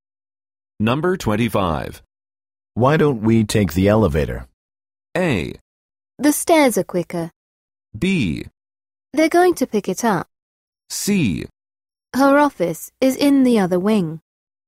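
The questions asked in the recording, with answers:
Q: Why don't we take the elevator?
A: A: The stairs are quicker.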